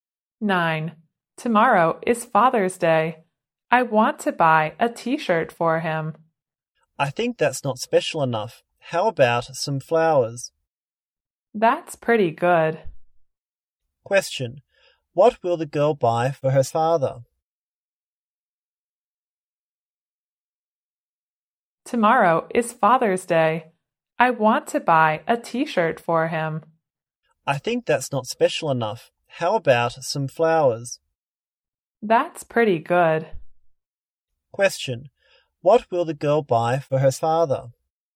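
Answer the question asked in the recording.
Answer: Some flowers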